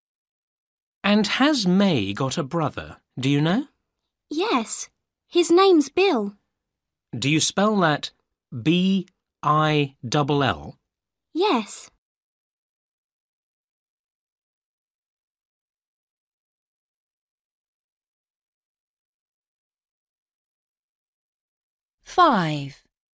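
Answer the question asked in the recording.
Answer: Bill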